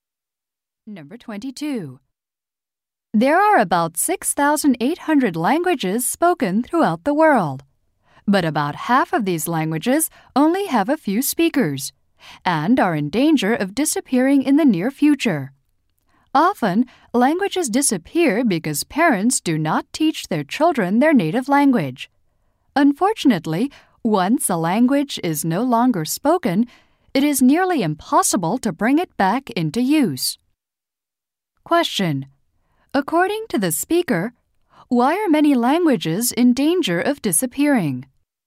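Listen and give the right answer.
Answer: Parents do not teach their children their native language.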